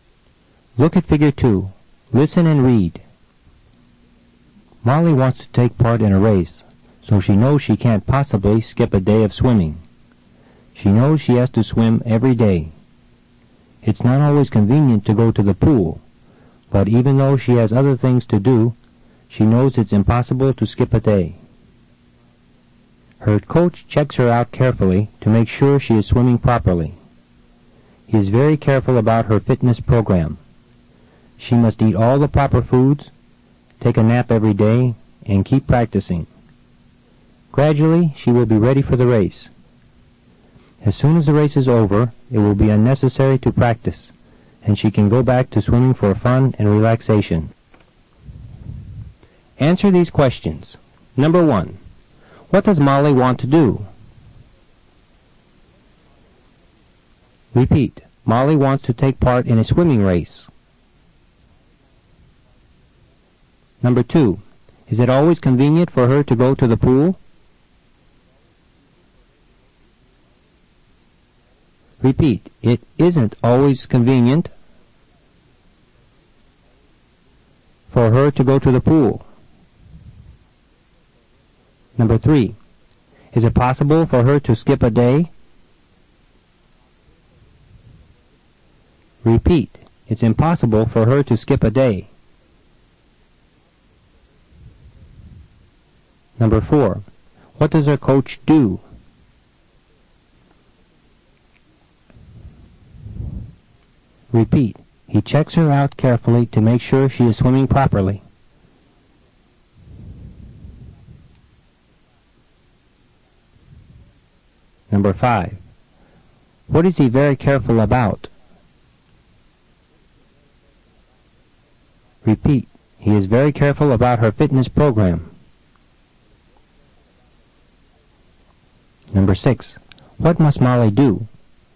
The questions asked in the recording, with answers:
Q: What does Molly want to do?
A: Molly wants to take part in a swimming race.

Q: Is it always convenient for her to go to the pool?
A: It isn't always convenient for her to go to the pool.

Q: Is it possible for her to skip a day?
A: It's impossible for her to skip a day.

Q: What does her coach do?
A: He checks her out carefully to make sure she is swimming properly.

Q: What is he very careful about?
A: He is very careful about her fitness program.

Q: What must Molly do?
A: She must eat all the proper foods, take a nap every day, and keep practicing.